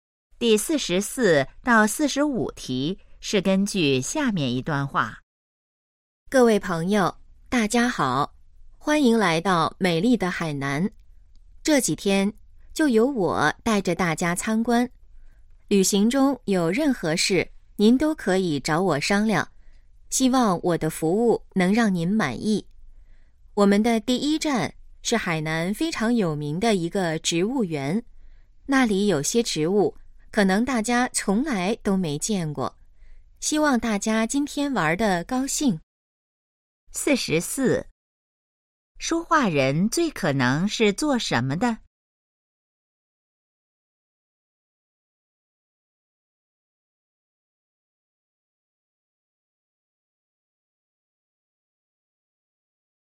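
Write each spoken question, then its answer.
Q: 说话人最可能是做什么的?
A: 导游

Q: 关于那个植物园,下列哪个正确?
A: 很有名,有些植物大家没见过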